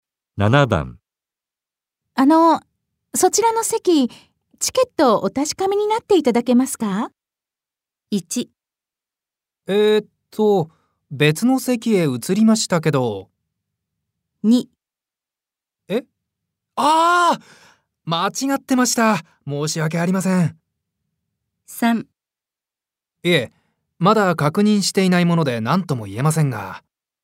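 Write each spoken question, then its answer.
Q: そちらの席、チケットをお確かめになっていただけますか?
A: 2: 間違ってました。申し訳ありません。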